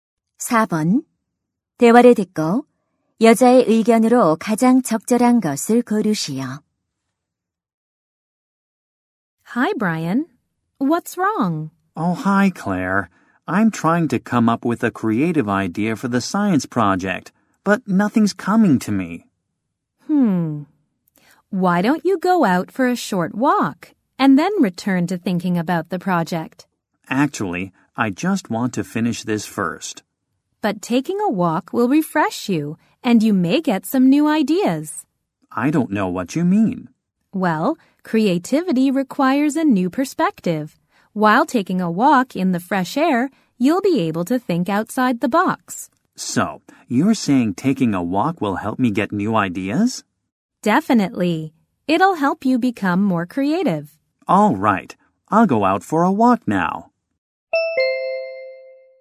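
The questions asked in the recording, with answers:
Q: 대화를 듣고 여자의 의견으로 가장 적절한 것을 고르시오.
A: 산책은 창의적인 아이디어를 얻는 데 도움이 된다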